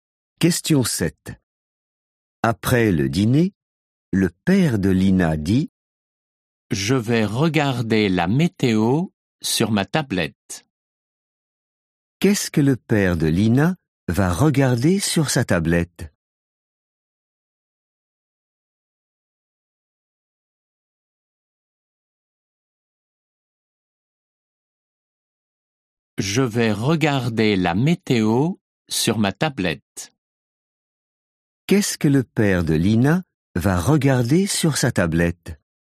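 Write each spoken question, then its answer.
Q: Qu'est-ce que le père de Lina va regarder sur sa tablette?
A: la météo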